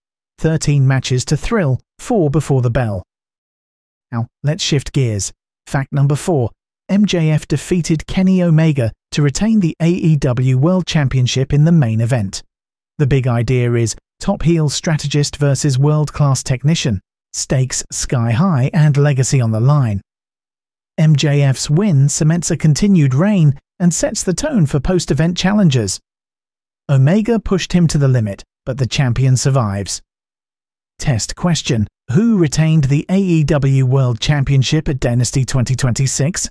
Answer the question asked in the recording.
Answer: MJF.